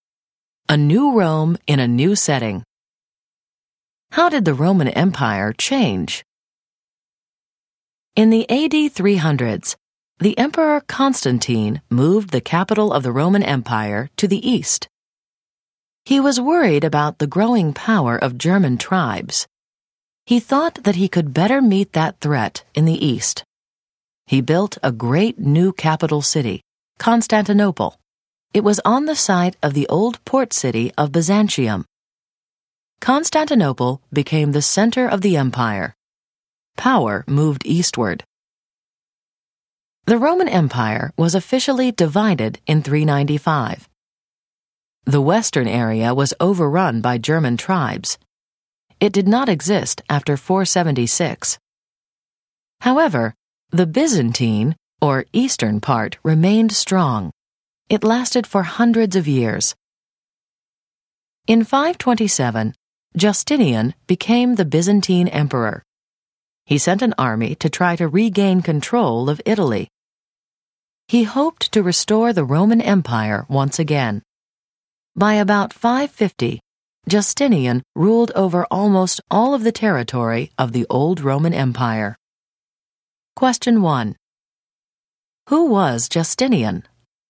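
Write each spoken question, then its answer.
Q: Who was Justinian?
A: A Byzantine emperor (from 527) who tried to restore the Roman Empire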